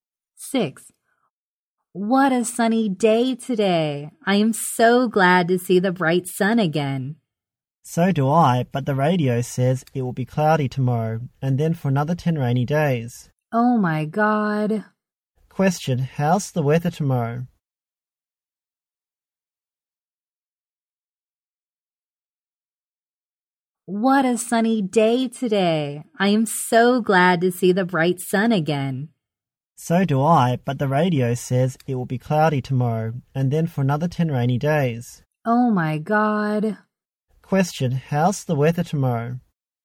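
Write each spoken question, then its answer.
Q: how's the weather tomorrow?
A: Cloudy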